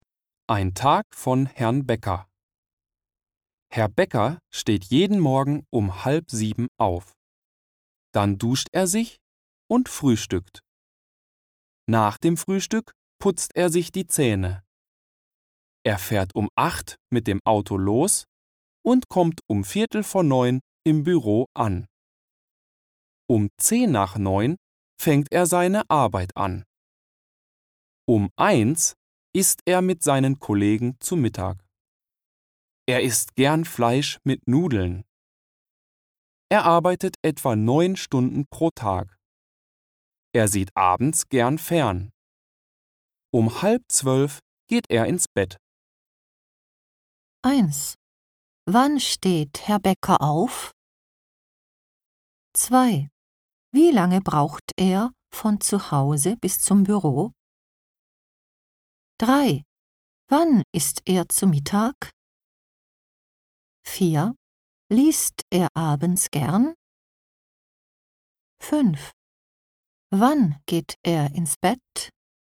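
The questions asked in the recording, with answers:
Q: Wann steht Herr Bäcker auf?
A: Um 6:30

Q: Wann isst er zu Mittag?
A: Um 1 Uhr

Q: Liest er abends gern?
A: Nein, er sieht abends gern fern.

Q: Wann geht er ins Bett?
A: Um 11:30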